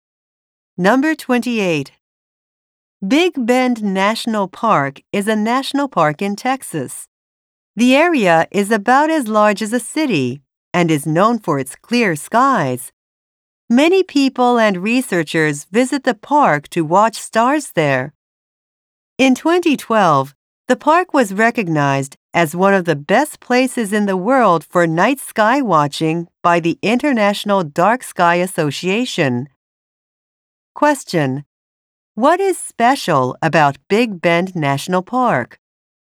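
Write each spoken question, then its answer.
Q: What is special about Big Bend National Park?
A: It is one of the best places in the world for night sky watching.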